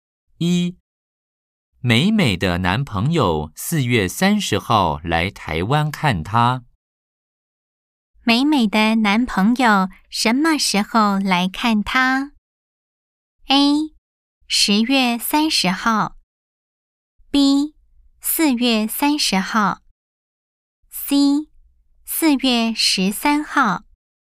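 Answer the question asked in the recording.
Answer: B: 四月三十号。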